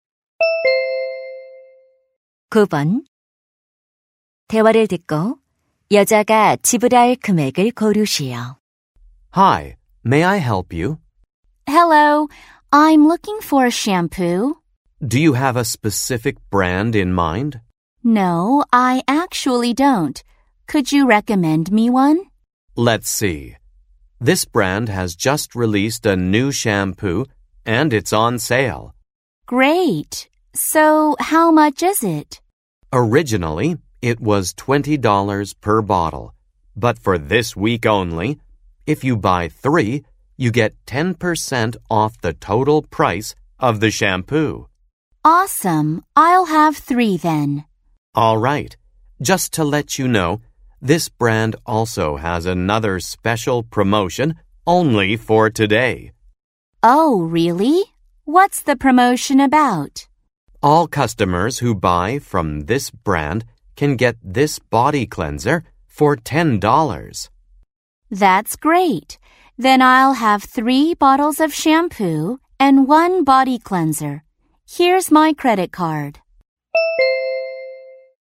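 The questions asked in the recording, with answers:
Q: 대화를 듣고 여자가 지불할 금액을 고르시오.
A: $64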